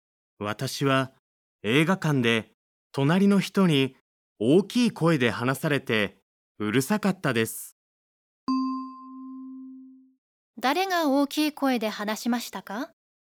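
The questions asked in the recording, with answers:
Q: 誰が大きい声で話しましたか?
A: 隣の人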